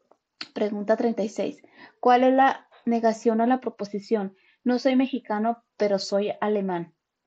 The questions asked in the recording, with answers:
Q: ¿Cuál es la negación a la proposición?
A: Y la respuesta correcta es la C, soy mexicano o no soy alemán.